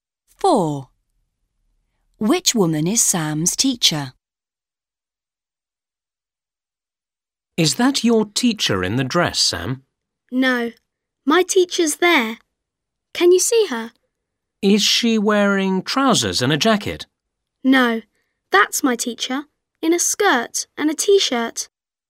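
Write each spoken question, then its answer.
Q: Which woman is Sam's teacher?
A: The one in a skirt and a t-shirt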